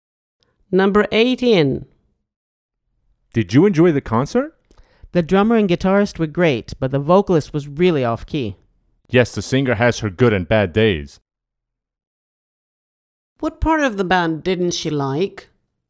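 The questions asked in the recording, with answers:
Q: What part of the band didn't she like?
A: The vocalist (singer)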